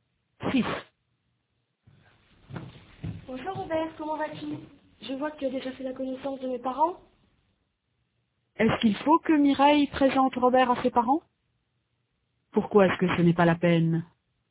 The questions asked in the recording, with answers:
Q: Pourquoi est-ce que ce n'est pas la peine?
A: Parce qu'il a déjà fait leur connaissance.